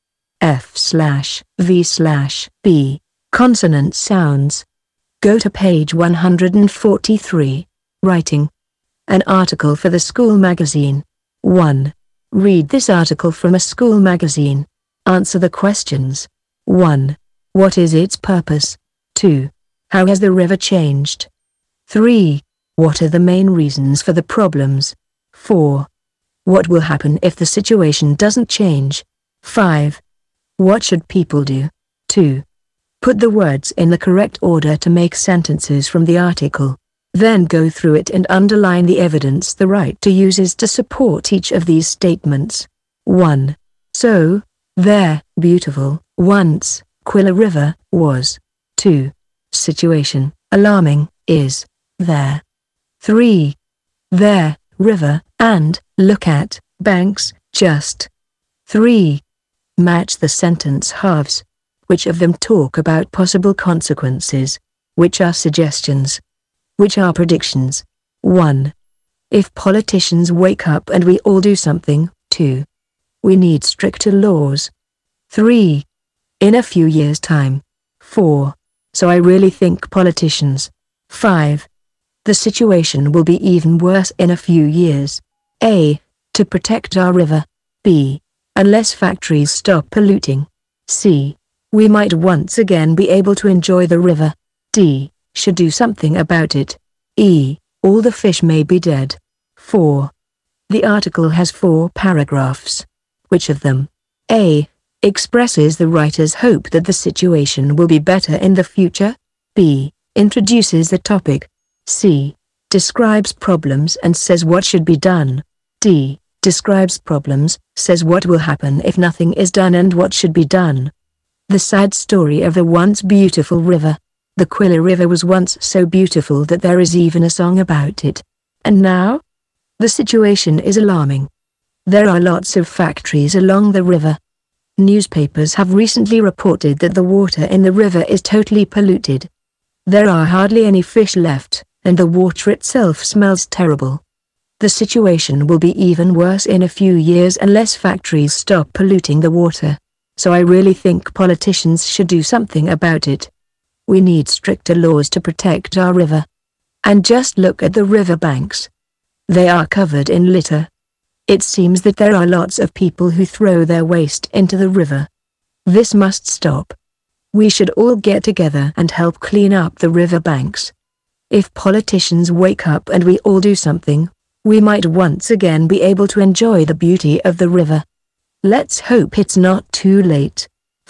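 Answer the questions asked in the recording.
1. To make people aware of the Quilla River's pollution and urge action to save it
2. It was once beautiful; now it is polluted, smells terrible, has hardly any fish, and its banks are covered in litter
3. Factories polluting the water and people throwing waste into the river
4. It will be even worse in a few years; all the fish may be dead
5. Politicians should make stricter laws, and everyone should help clean up the river banks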